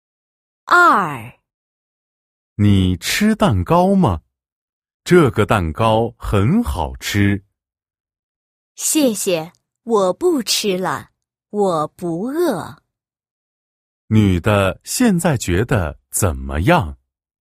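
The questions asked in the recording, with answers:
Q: 女的现在觉得怎么样?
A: 不饿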